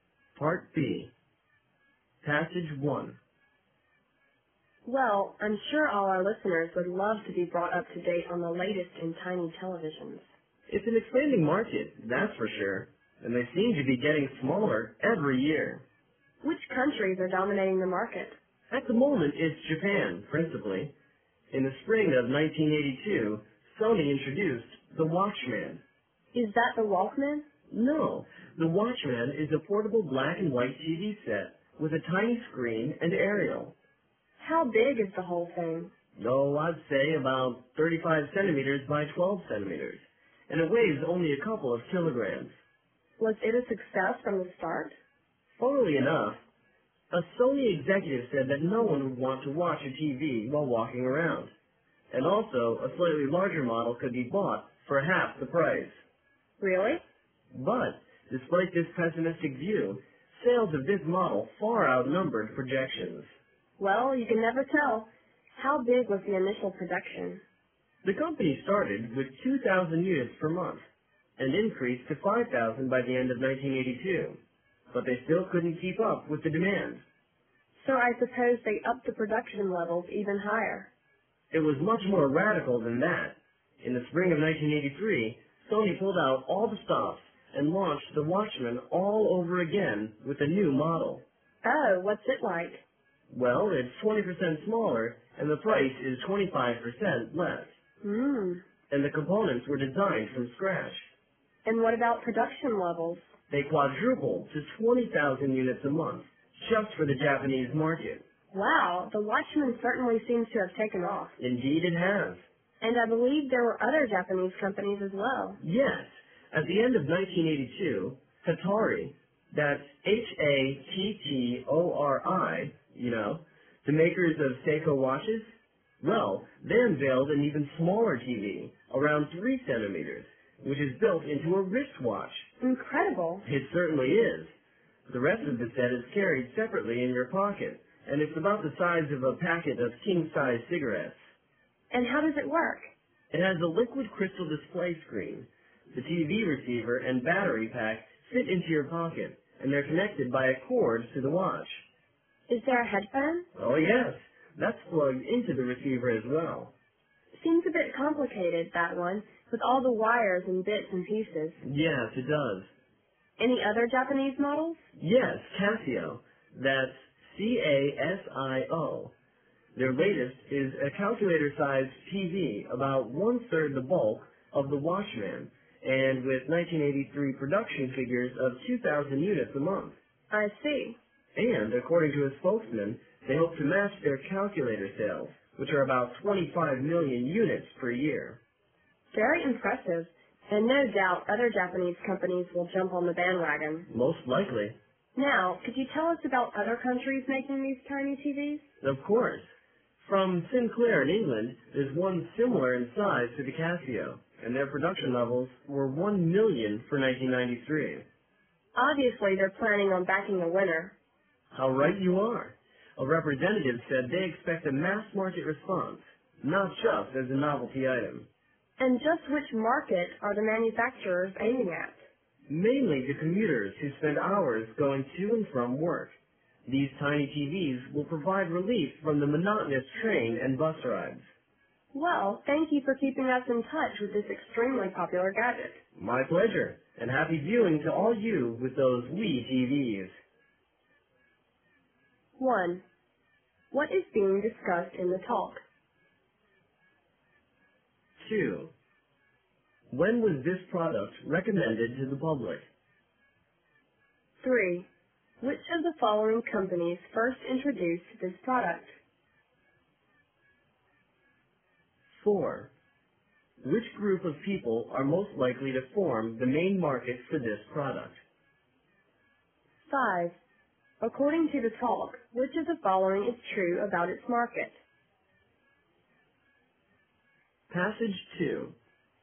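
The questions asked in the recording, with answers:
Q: What is being discussed in the talk?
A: Tiny portable televisions

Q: When was this product recommended to the public?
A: In the spring of 1982

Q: Which group of people are most likely to form the main market for this product?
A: Commuters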